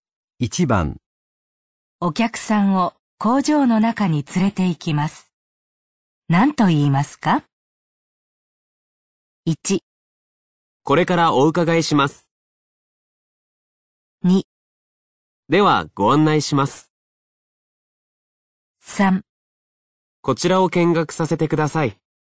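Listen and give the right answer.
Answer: 2: ではご案内します。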